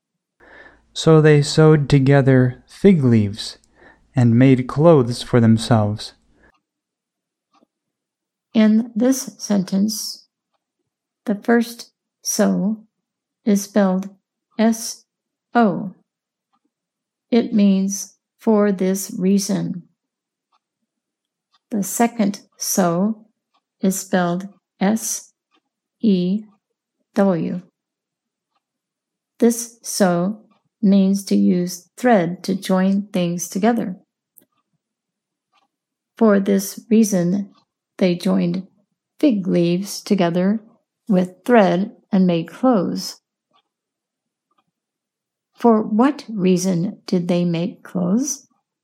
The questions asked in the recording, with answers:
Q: For what reason did they make clothes?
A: They made clothes because they saw that they were naked.